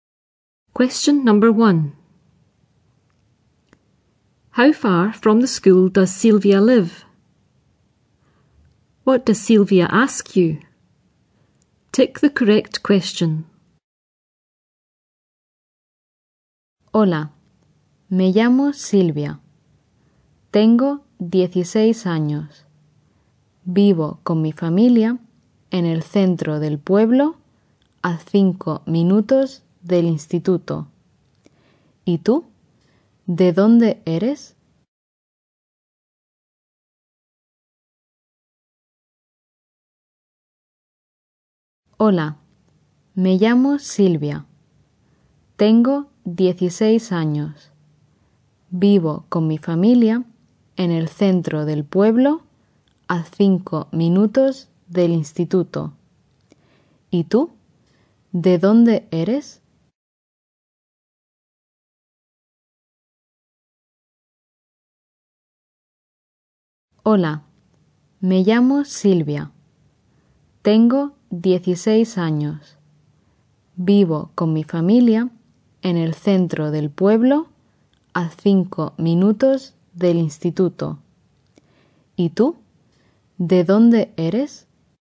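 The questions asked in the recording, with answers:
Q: How far from the school does Silvia live?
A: 5 minutes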